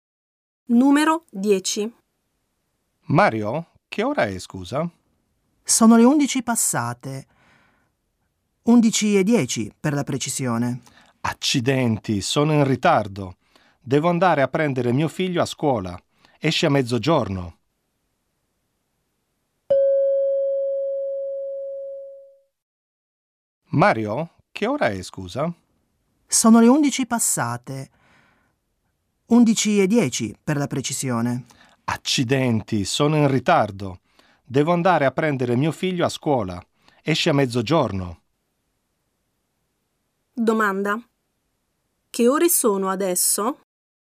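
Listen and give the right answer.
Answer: Le 11:10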